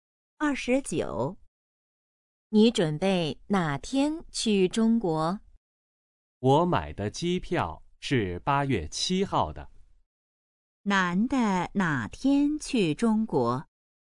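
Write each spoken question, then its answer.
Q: 男的哪天去中国?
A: 8月7号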